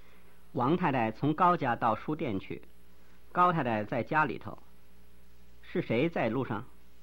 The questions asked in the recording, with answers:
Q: 是谁在路上?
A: 王太太在路上。